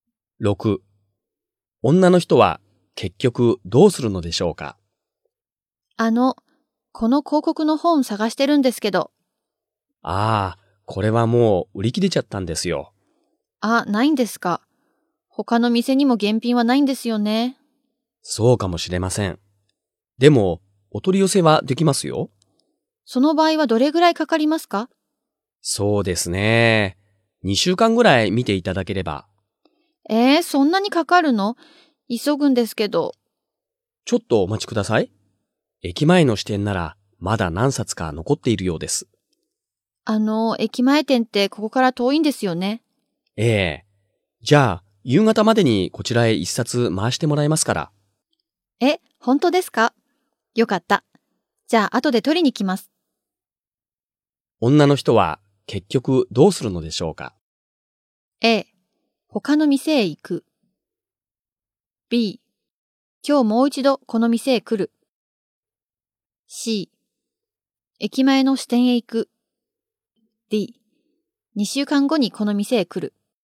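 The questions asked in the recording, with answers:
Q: 女の人は結局どうするのでしょうか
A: B: 今日もう一度この店へ来る。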